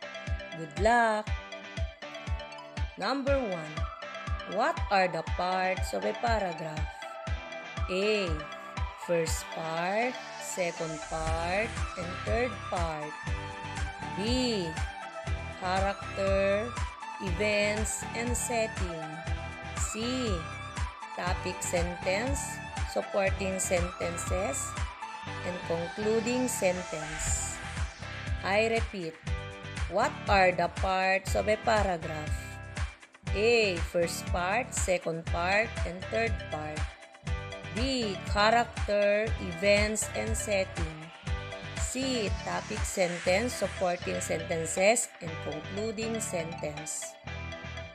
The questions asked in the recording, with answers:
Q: What are the parts of a paragraph?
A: Yes, letter C. Topic sentence, supporting sentences, and concluding sentence.